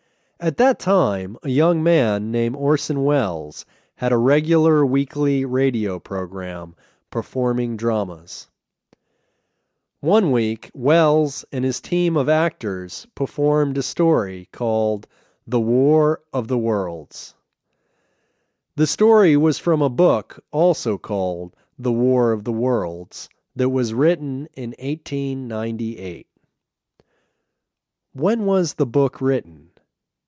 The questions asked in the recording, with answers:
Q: When was the book written?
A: The book was written in 1898.